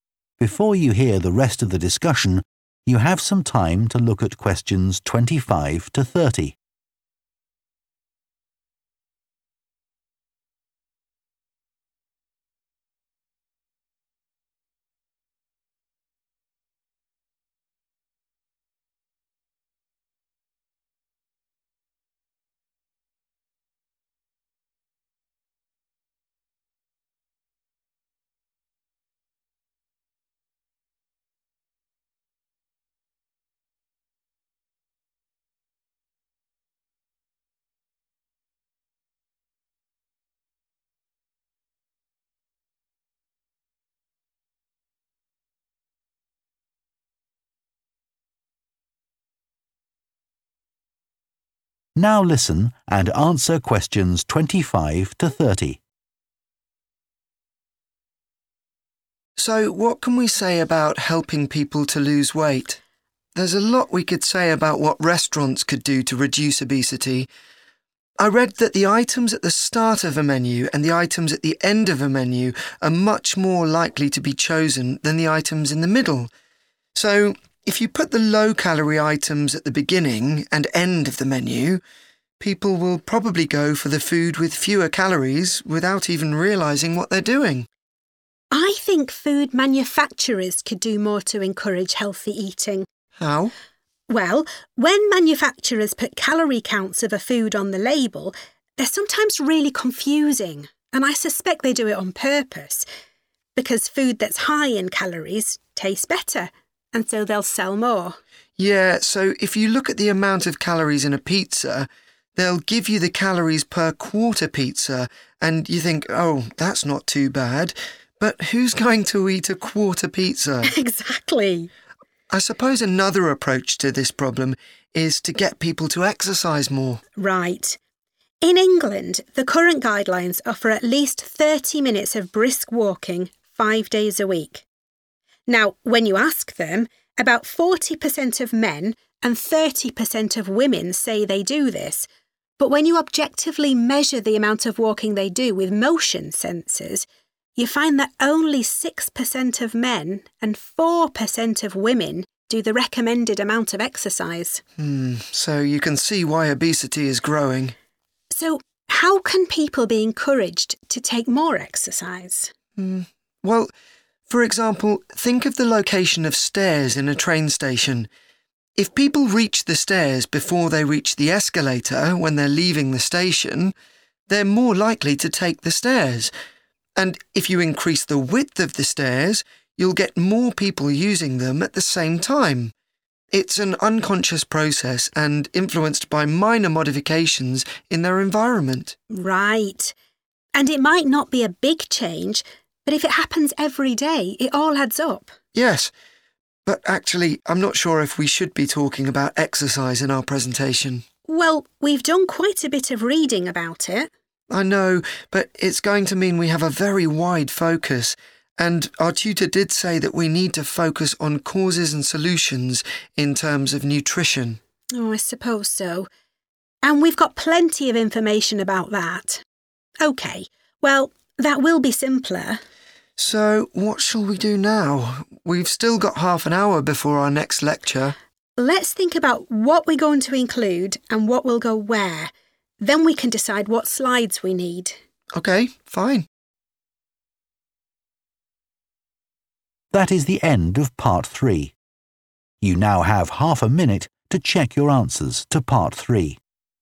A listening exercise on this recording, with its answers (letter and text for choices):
Choose the correct letter, A, B or C.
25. Adam suggests that restaurants could reduce obesity if their menus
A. offered fewer options.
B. had more low-calorie foods.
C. were organised in a particular way.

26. The students agree that food manufacturers deliberately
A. make calorie counts hard to understand.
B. fail to provide accurate calorie counts.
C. use ineffective methods to reduce calories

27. What does Rosie say about levels of exercise in England?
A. The amount recommended is much too low.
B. Most people overestimate how much they do.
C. Women now exercise more than they used to.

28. Adam refers to the location and width of stairs in a train station to illustrate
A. practical changes that can influence people's behaviour.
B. methods of helping people who have mobility problems.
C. ways of preventing accidents by controlling crowd movement.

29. What do the students agree about including reference to exercise in their presentation?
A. They should probably leave it out.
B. They need to do more research on it.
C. They should discuss this with their tutor.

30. What are the students going to do next for their presentation?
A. prepare some slides for it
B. find out how long they have for it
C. decide on its content and organisation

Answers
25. C. were organised in a particular way.
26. A. make calorie counts hard to understand.
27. B. Most people overestimate how much they do.
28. A. practical changes that can influence people's behaviour.
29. A. They should probably leave it out.
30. C. decide on its content and organisation